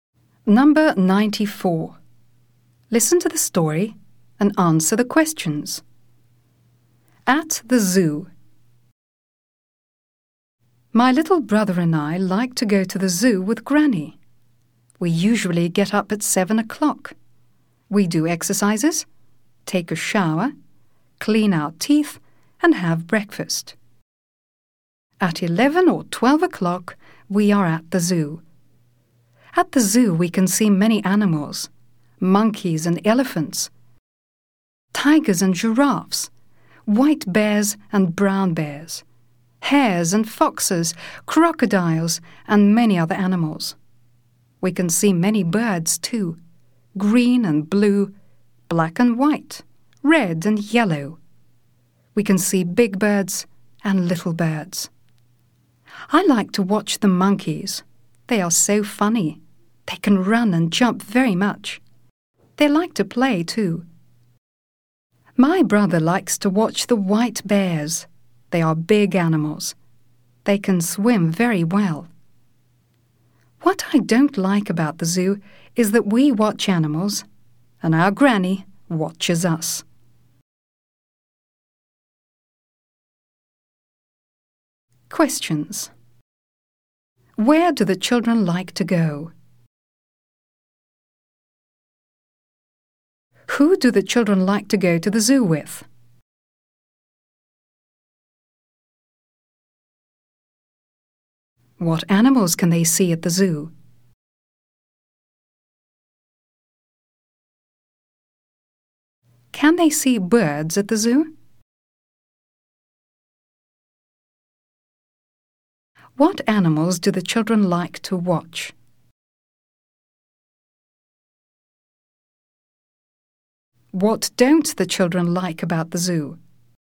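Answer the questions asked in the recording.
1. To the zoo
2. With Granny
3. Monkeys, elephants, tigers, giraffes, white and brown bears, hares, foxes, crocodiles
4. Yes, they can
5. Monkeys and white bears
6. That their granny watches them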